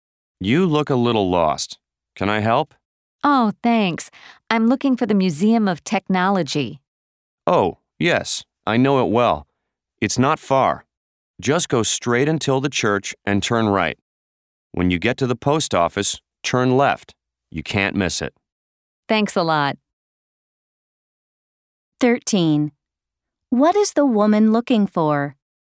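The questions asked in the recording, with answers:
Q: What is the woman looking for?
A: The Museum of Technology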